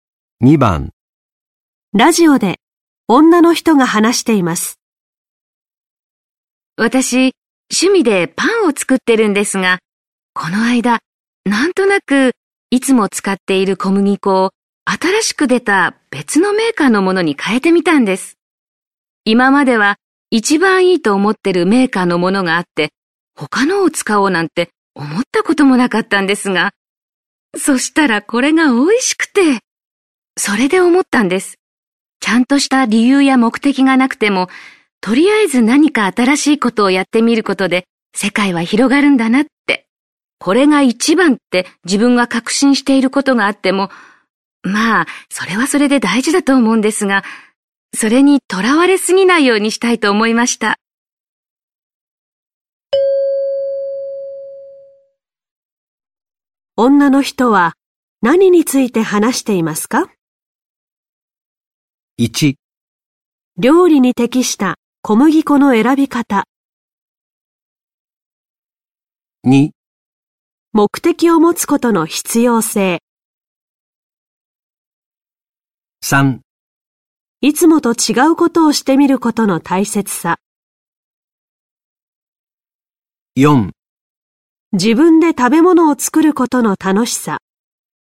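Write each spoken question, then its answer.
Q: 女の人は何について話していますか?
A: 3: いつもと違うことをしてみることの大切さ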